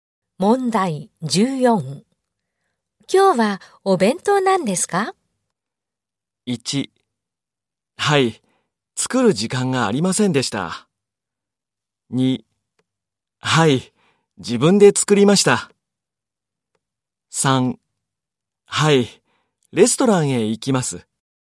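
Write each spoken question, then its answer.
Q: 今日はお弁当なんですか?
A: 3: はい、自分で作りました。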